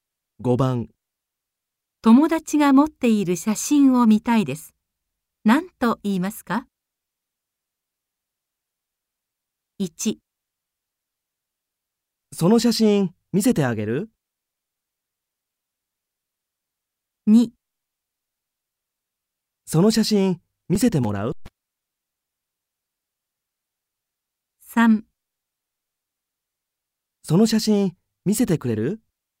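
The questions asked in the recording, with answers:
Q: 友達が持っている写真を見たいです。何と言いますか?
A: 3: その写真見せてくれる?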